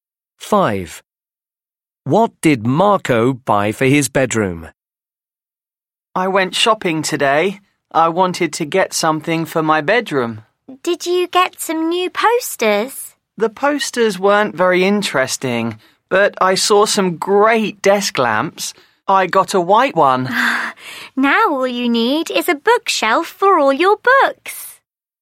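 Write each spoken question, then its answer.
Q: What did Marco buy for his bedroom?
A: a desk lamp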